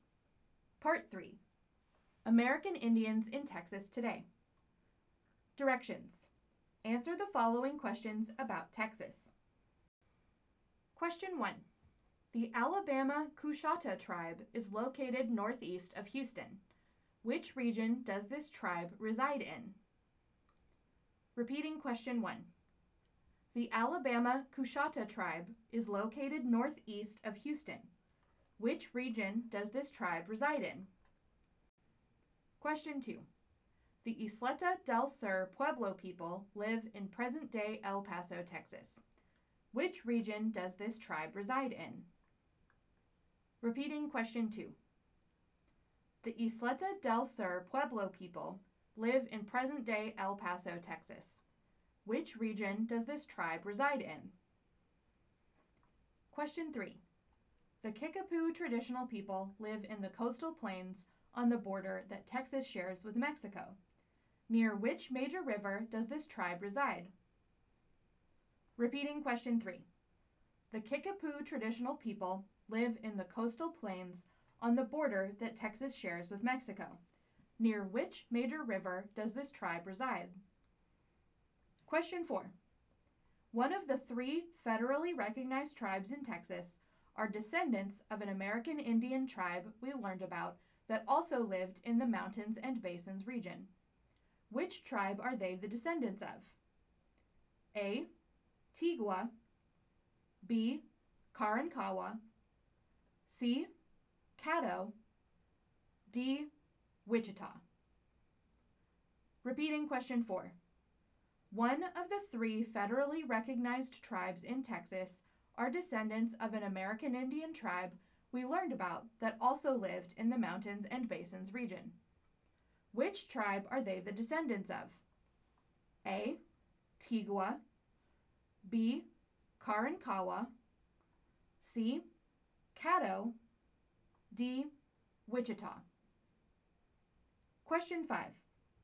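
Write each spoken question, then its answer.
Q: Which region does this tribe reside in?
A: Mountains and basins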